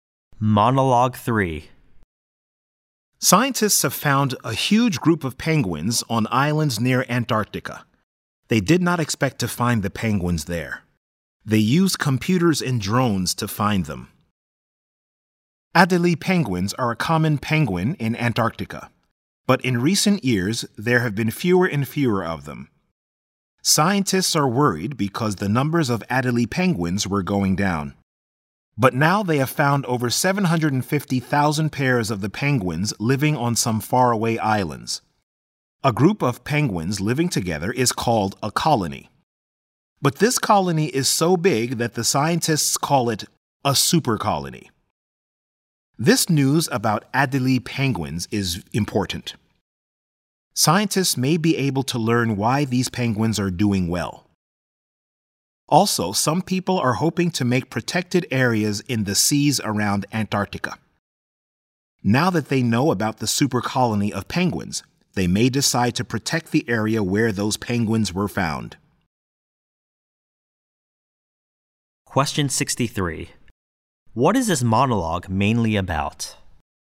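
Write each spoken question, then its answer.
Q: What is this monologue mainly about?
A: The discovery of a super colony of Adélie penguins near Antarctica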